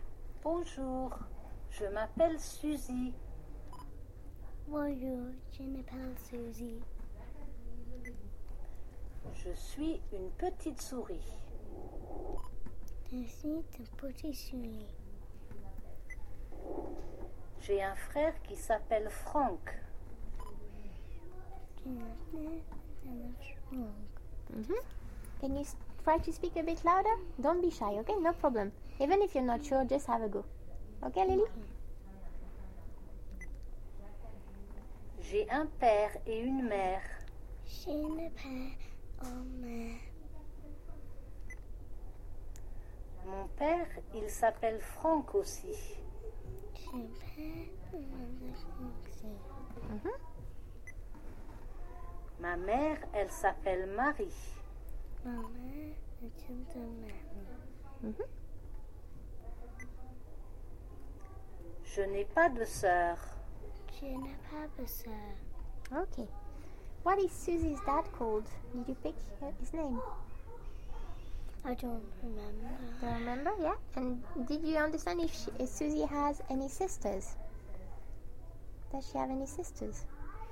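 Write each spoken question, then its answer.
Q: What is Susie's dad called?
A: Franck

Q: Does she have any sisters?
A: No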